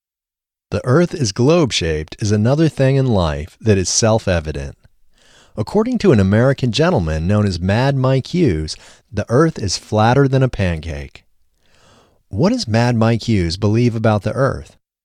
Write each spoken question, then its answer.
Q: What does Mad Mike Hughes believe about the Earth?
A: Mad Mike Hughes believes the Earth is flatter than a pancake.